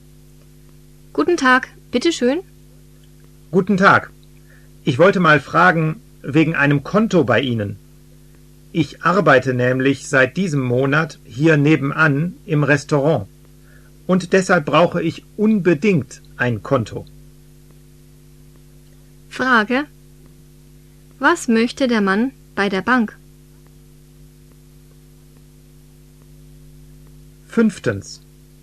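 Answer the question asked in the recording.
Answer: Ein Konto eröffnen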